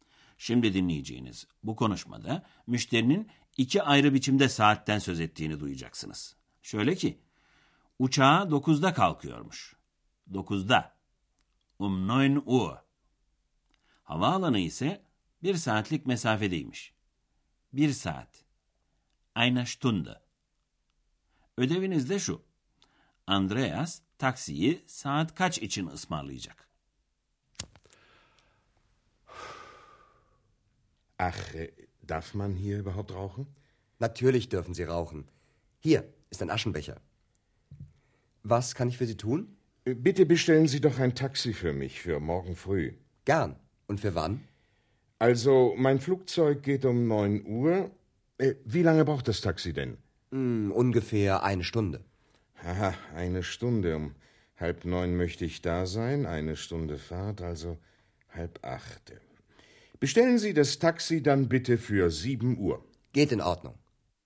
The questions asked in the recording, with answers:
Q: Andreas taksiyi saat kaç için ısmarlayacak?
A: Andreas taksiyi ertesi sabah saat 7 için ısmarlayacak.